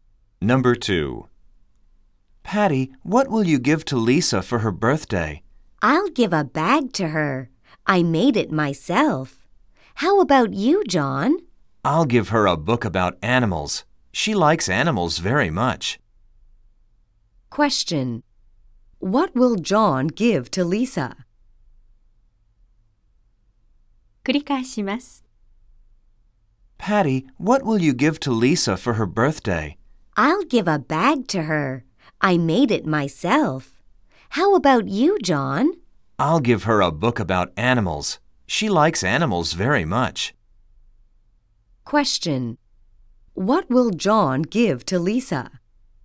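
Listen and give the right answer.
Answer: A book about animals.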